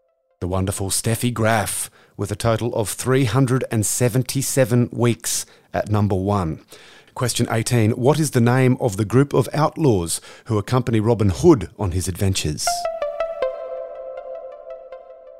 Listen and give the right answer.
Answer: The Merry Men.